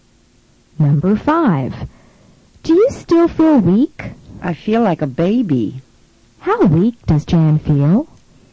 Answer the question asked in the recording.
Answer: She feels as weak as a baby.